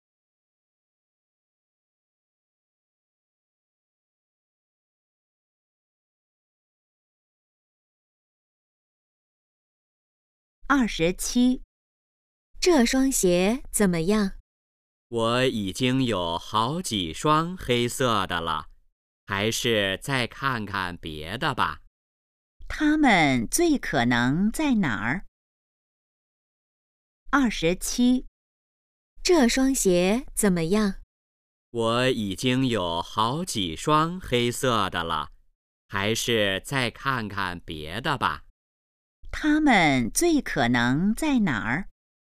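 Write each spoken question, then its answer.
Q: 他们最可能在哪儿?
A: 商店(鞋店)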